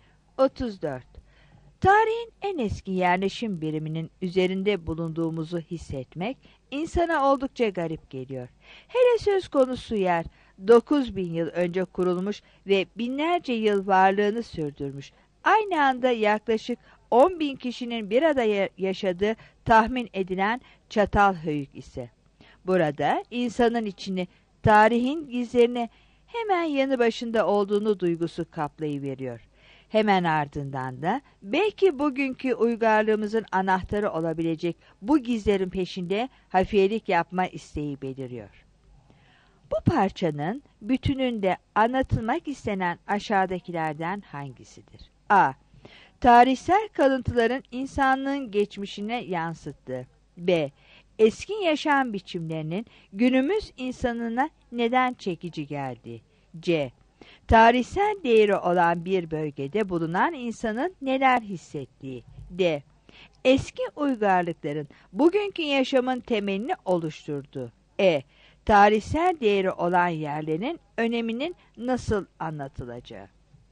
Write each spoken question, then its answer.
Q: Bu parçanın bütününde anlatılmak istenen aşağıdakilerden hangisidir?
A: 34 C